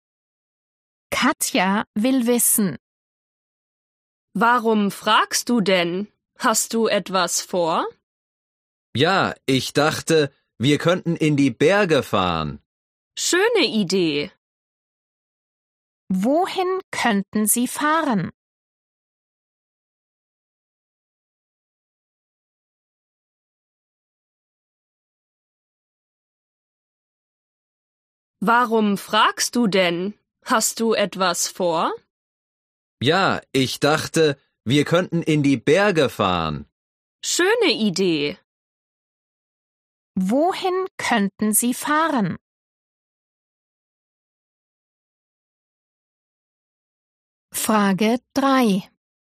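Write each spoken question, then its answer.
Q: Wohin könnten Sie fahren?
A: In die Berge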